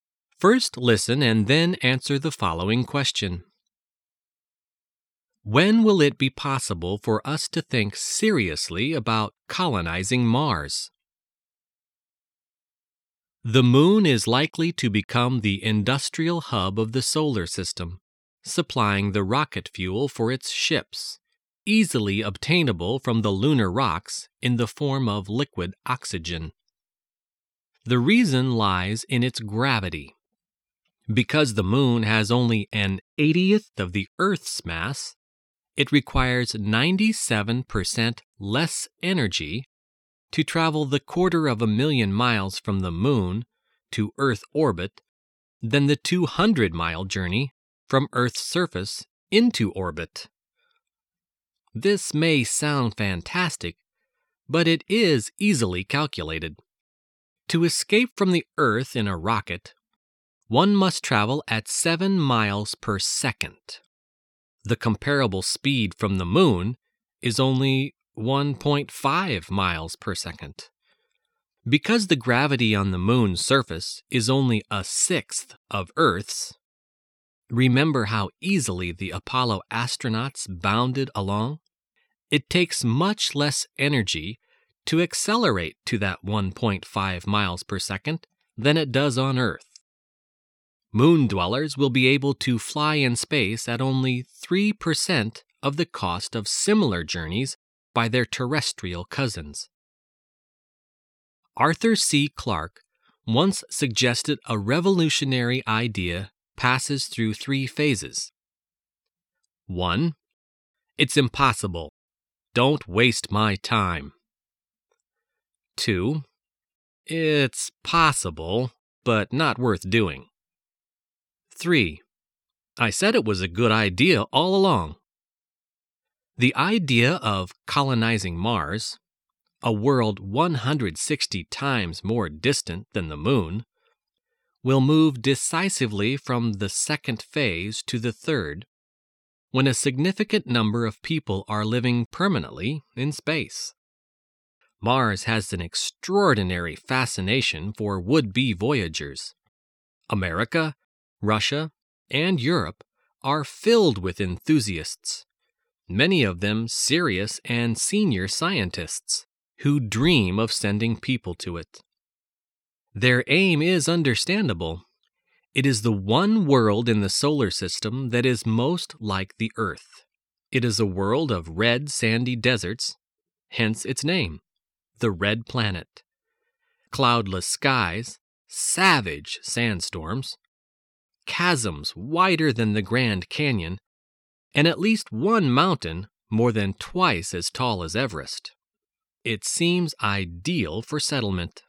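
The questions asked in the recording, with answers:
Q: When will it be possible for us to think seriously about colonizing Mars?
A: When a significant number of people are living permanently in space.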